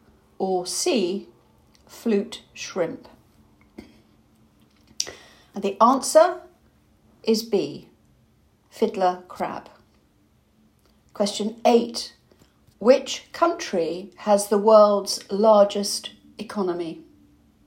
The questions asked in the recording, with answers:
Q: Which country has the world's largest economy?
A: The answer is America.